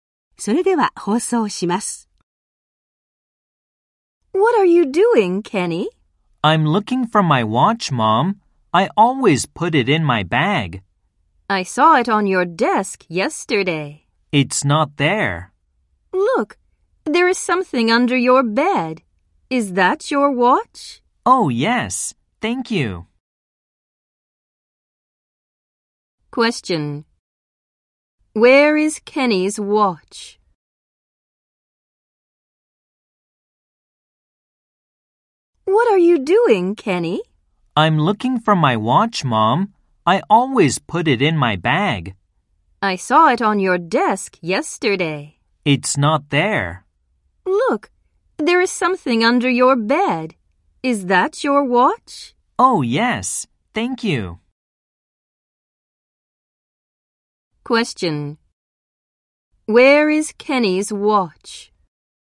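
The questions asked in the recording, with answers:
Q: Where is Kenny's watch?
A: Under his bed.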